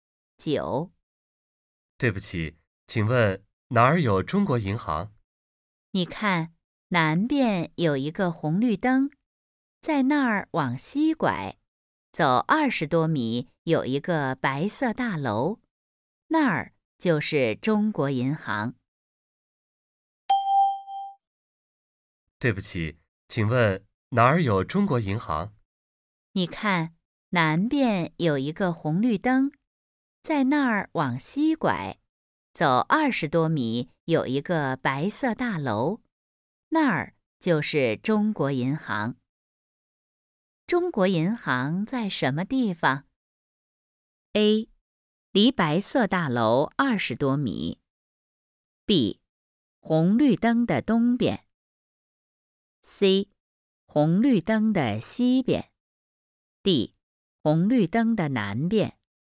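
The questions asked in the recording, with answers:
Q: 中国银行在什么地方?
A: C: 红绿灯的西边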